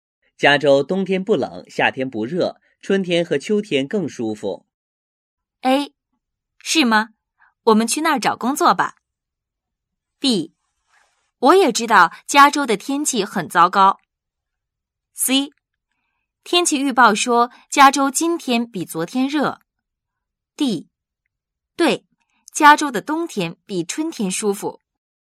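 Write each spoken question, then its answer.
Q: 加州冬天不冷,夏天不热,春天和秋天更舒服。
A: A: 是吗?我们去那儿找工作吧。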